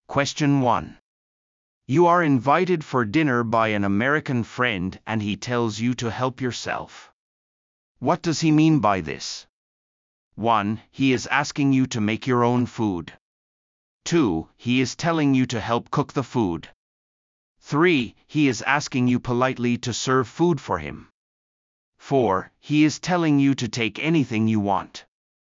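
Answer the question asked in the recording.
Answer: 4: He is telling you to take anything you want.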